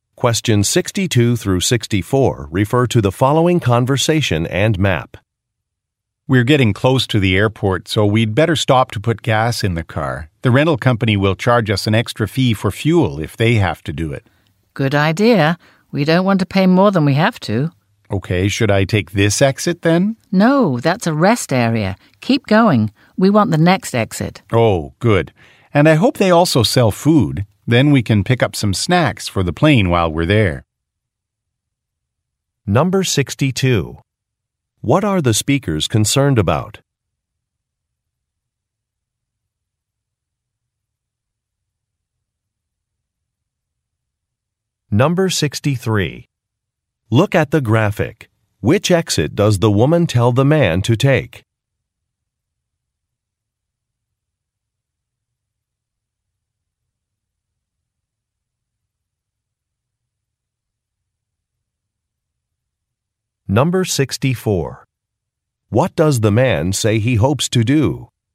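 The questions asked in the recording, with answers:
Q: What are the speakers concerned about?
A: Paying an extra fuel fee to the rental company

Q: What does the man say he hopes to do?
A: Buy snacks for the plane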